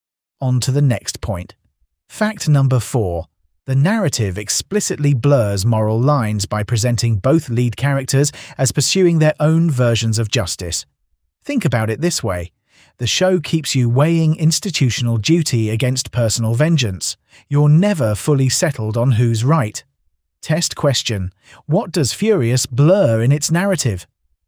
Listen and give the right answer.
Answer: Moral lines.